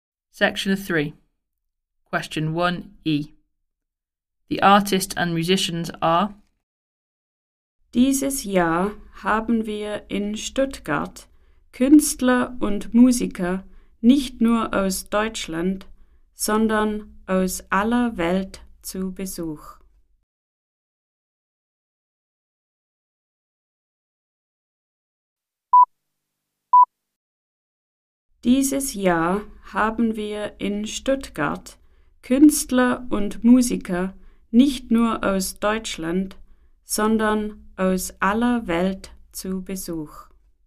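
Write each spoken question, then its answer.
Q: The artists and musicians are.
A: from all over the world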